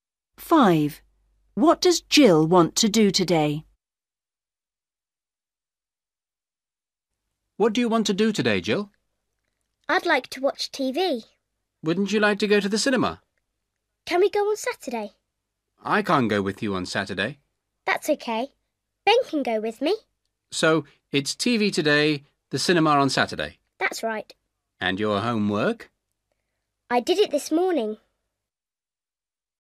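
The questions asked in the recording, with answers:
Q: What does Jill want to do today?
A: Watch TV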